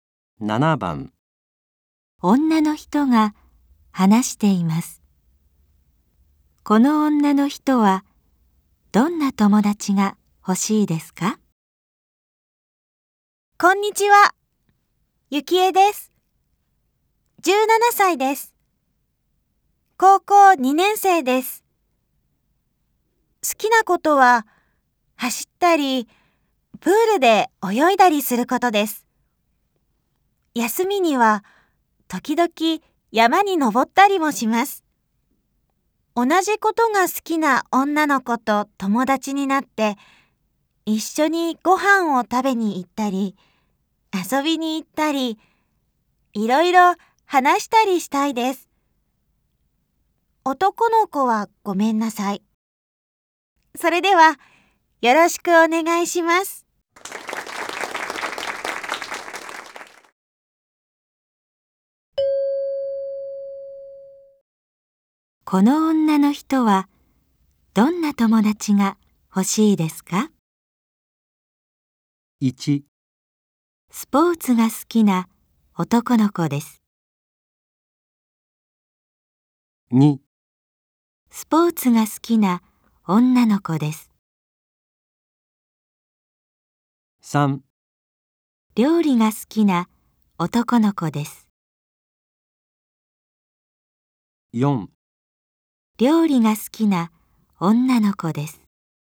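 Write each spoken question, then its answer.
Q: この女の人はどんな友達が欲しいですか?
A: 2: スポーツが好きな女の子です。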